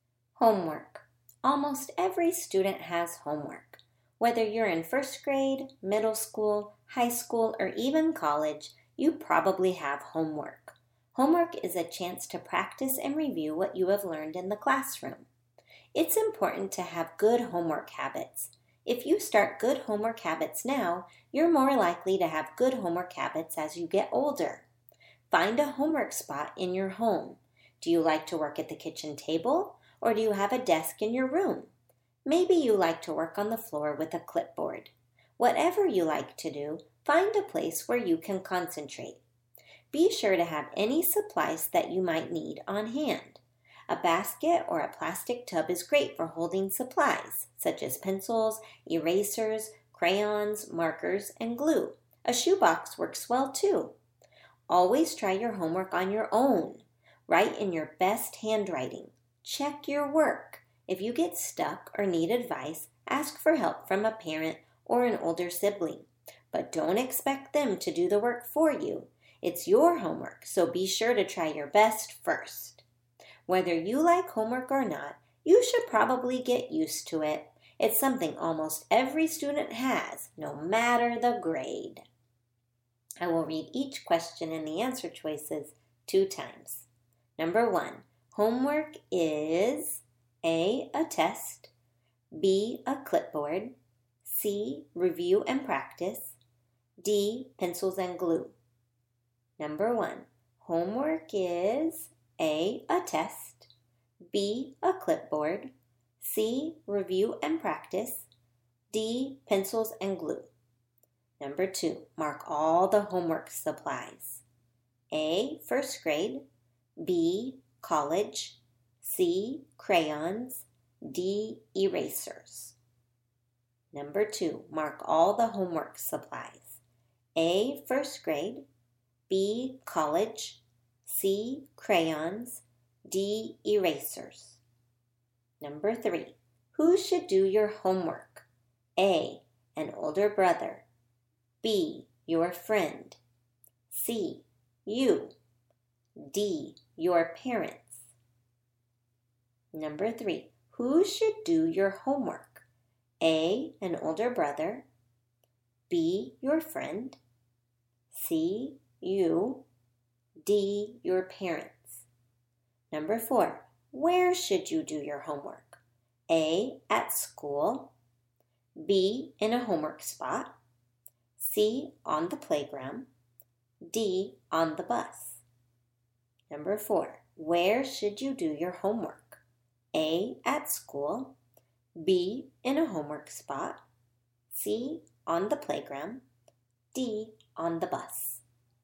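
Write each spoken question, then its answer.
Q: Homework is A, a test, B, a clipboard, C, review and practice, D, pencils and glue.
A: C: review and practice

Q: mark all the homework supplies.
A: C: crayons, D: erasers

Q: who should do your homework?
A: C: you

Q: where should you do your homework?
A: B: in a homework spot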